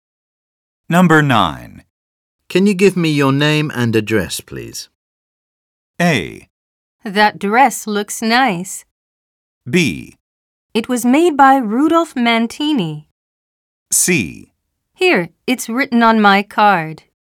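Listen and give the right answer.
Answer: C: Here, it's written on my card.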